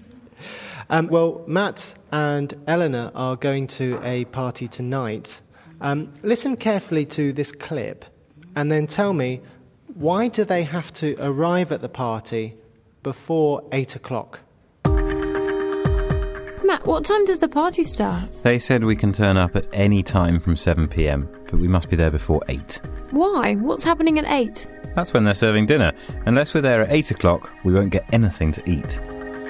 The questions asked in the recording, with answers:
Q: why do they have to arrive at the party before 8 o'clock?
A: Maybe they will have nothing to eat after 8 o'clock.